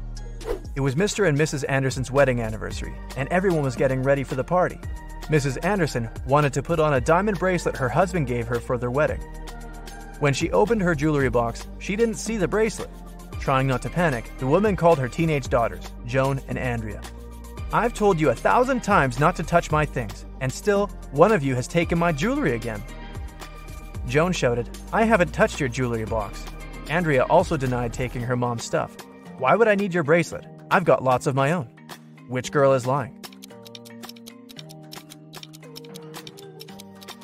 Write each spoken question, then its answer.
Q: Which girl is lying?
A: It was Andrea who took the earrings.